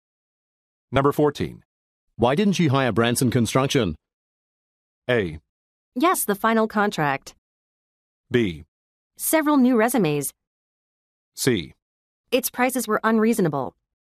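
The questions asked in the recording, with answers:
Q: Why didn't you hire Branson Construction?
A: C: Its prices were unreasonable.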